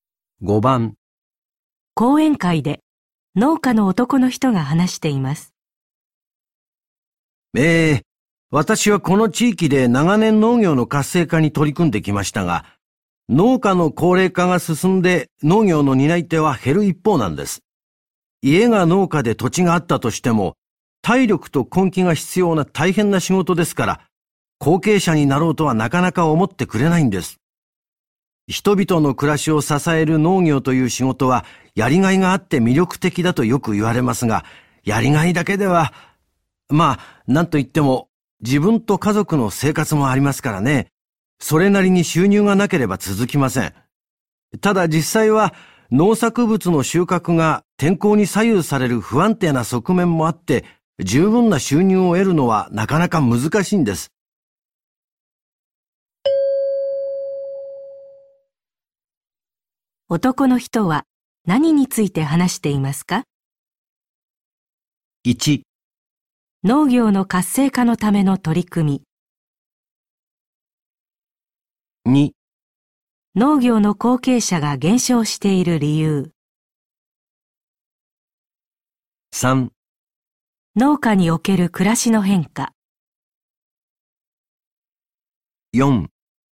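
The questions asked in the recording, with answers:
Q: 男の人は何について話していますか?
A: 2: 農業の後継者が減少している理由。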